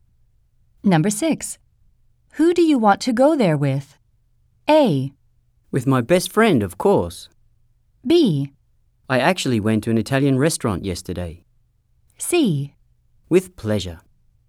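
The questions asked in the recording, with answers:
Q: Who do you want to go there with?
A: A: With my best friend, of course.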